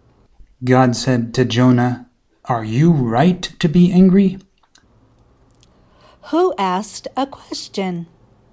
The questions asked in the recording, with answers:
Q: Who asked a question?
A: God asked a question.